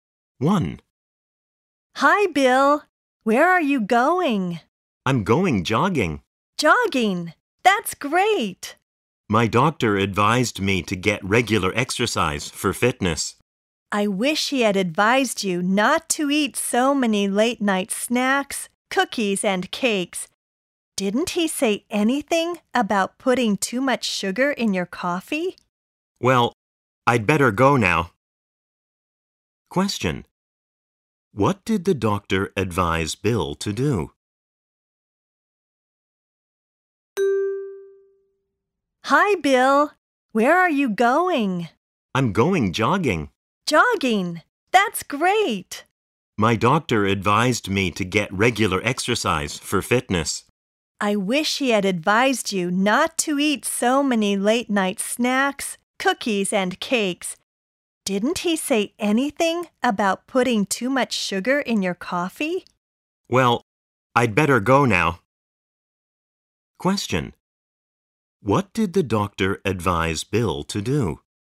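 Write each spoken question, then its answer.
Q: What did the doctor advise Bill to do?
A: To get regular exercise for fitness.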